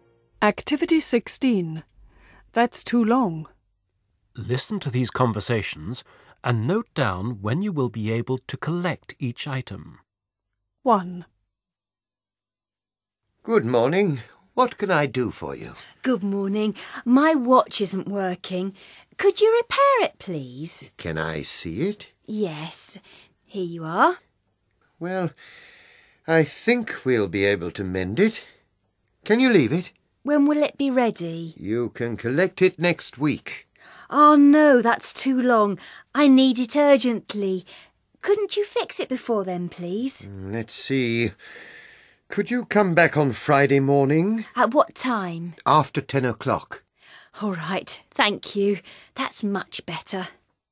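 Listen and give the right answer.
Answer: Friday morning, after 10 o'clock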